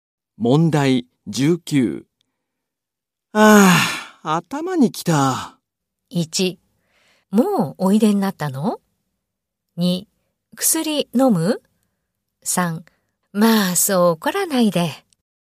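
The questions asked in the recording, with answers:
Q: ああ、頭にきた。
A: 1: まあそう怒らないで。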